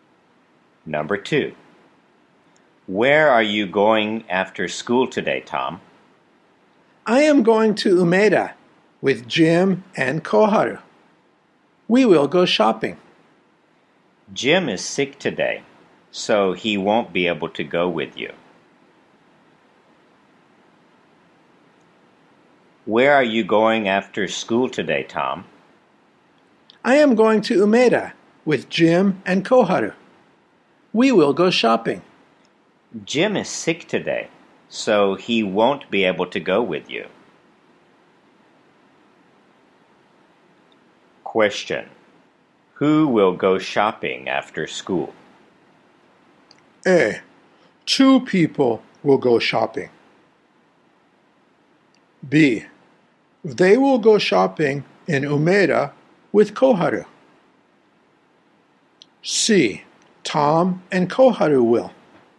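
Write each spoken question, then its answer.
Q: Who will go shopping after school?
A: C: Tom and Koharu will.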